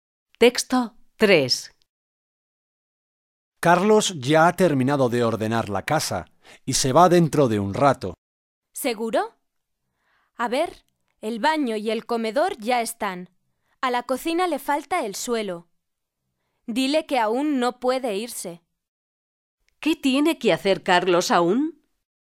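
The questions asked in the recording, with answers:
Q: ¿Qué tiene que hacer Carlos aún?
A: Limpiar el suelo de la cocina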